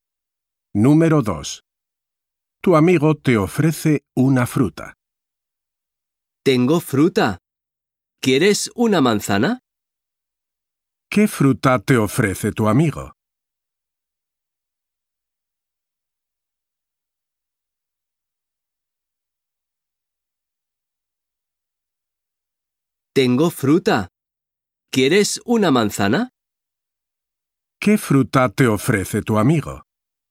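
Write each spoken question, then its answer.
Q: ¿Qué fruta te ofrece tu amigo?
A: Una manzana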